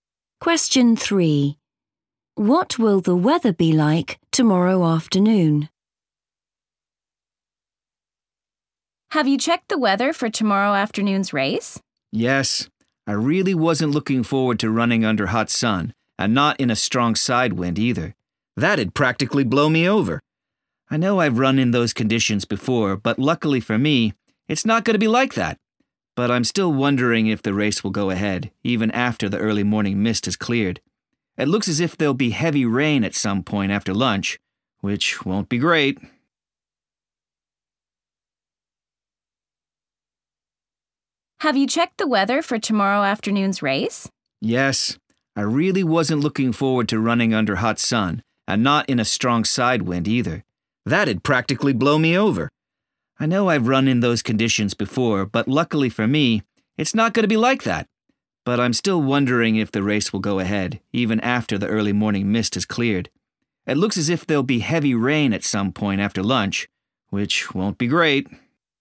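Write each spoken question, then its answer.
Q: What will the weather be like tomorrow afternoon?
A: heavy rain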